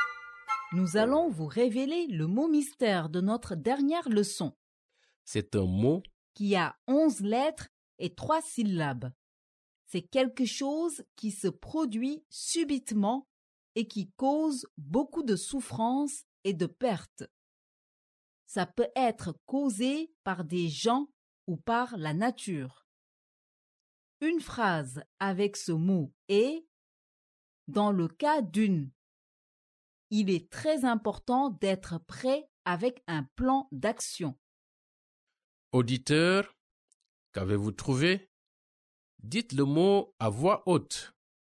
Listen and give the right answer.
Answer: Le mot mystère d'aujourd'hui est catastrophe.